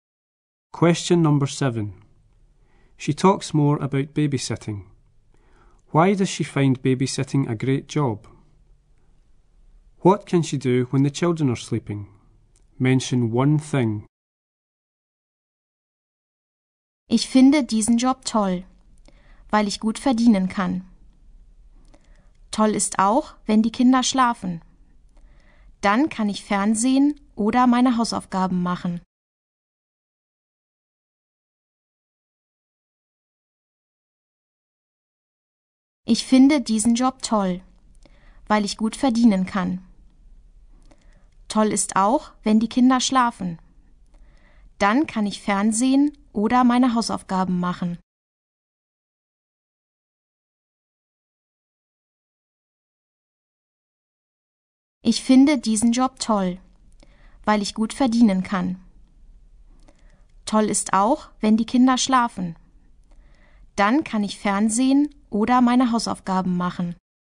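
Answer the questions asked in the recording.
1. She can earn good money
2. Watch TV or do her homework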